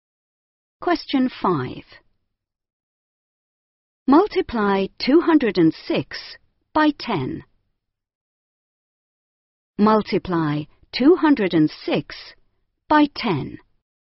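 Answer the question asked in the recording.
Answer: 2060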